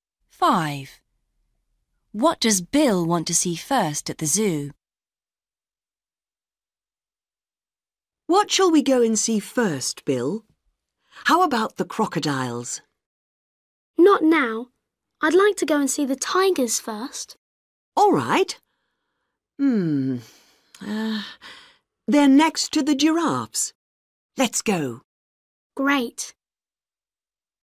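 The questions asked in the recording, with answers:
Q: What does Bill want to see first at the zoo?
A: The tigers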